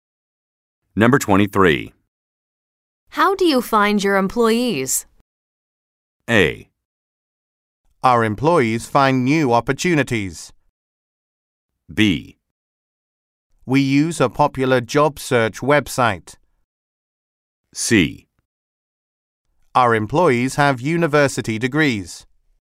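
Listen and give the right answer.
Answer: B: We use a popular job search website.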